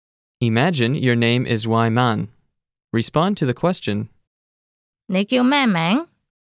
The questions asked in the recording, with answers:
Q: 你叫咩名?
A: 我叫偉文。